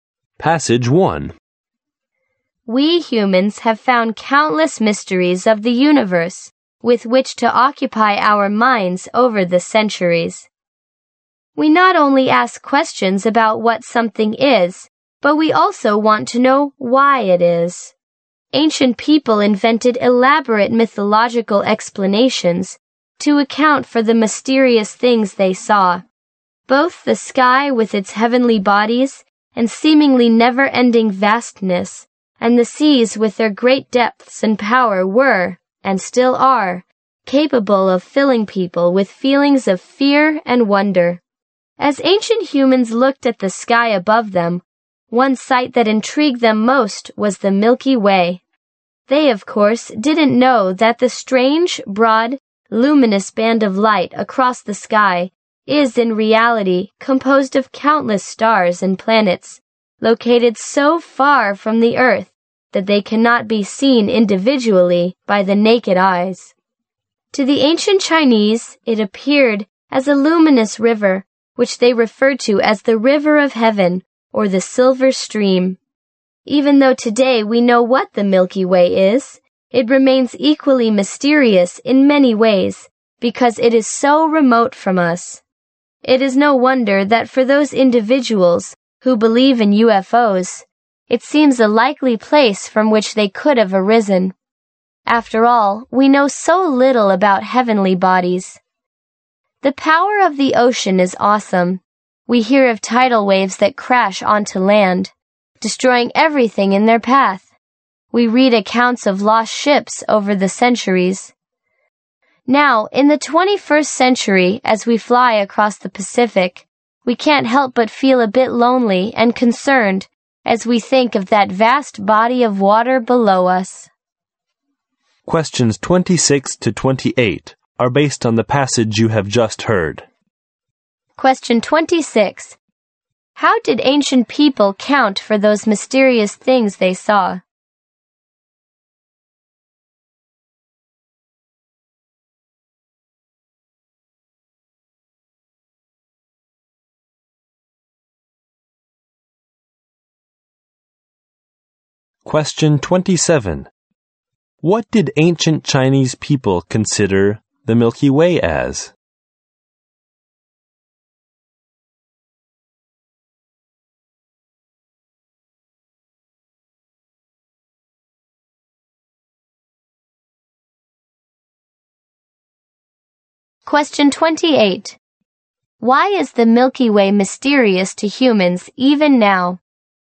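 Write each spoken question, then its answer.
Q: How did ancient people count for those mysterious things they saw?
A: With elaborate mythological explanations.

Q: What did ancient Chinese people consider the Milky Way as?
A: A luminous river: the River of Heaven, or the Silver Stream.

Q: Why is the Milky Way mysterious to humans even now?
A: Because it is so remote from us.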